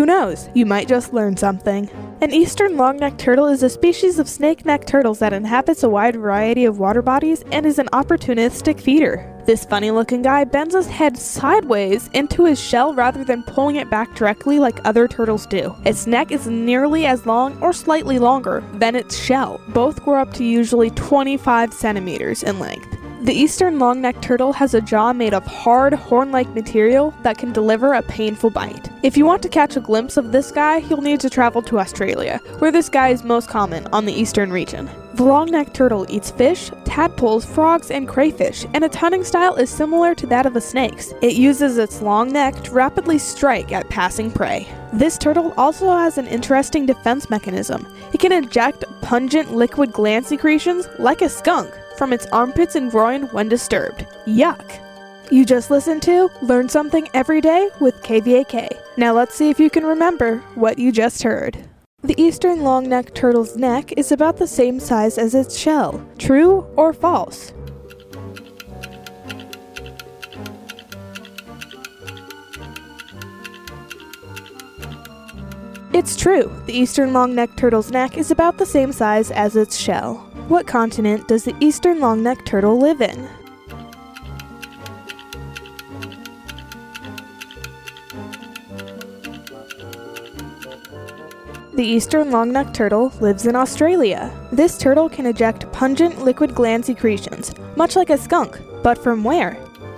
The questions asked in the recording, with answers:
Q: The eastern long-necked turtle's neck is about the same size as its shell. True or false?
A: It's true. The eastern long-necked turtle's neck is about the same size as its shell.

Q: This turtle can eject pungent liquid gland secretions, much like a skunk, but from where?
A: The eastern long-necked turtle can eject pungent liquid gland secretions from its armpits.